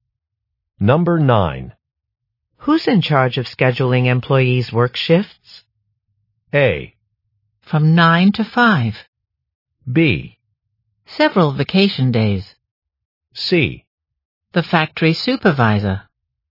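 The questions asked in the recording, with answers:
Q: Who's in charge of scheduling employees' work shifts?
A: C: The factory supervisor.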